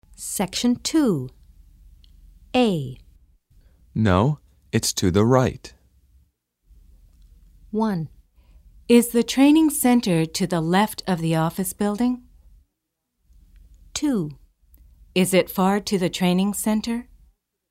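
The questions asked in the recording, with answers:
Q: No, it's to the right.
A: 1: Is the training center to the left of the office building?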